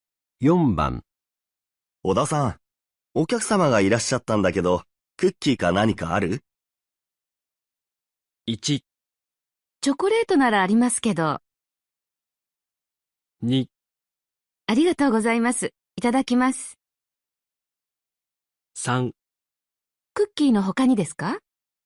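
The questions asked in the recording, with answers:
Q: 小田さん、お客様がいらっしゃったんだけど、クッキーか何かある?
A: 1: チョコレートならありますけど。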